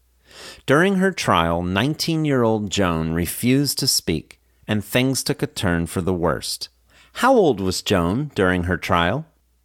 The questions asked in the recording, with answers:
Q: How old was Joan during her trial?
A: During her trial, she was 19 years old.